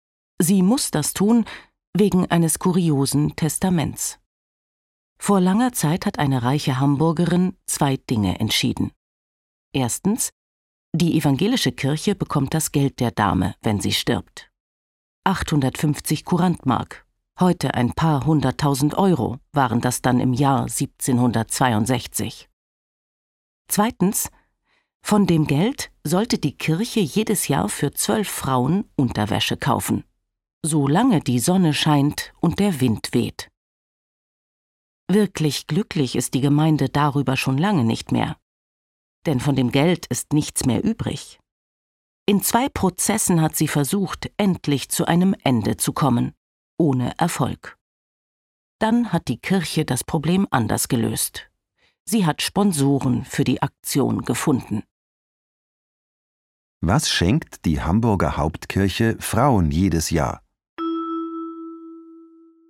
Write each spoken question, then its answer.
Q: Was schenkt die Hamburger Hauptkirche Frauen jedes Jahr?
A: Sie schenkt ihnen Unterwäsche.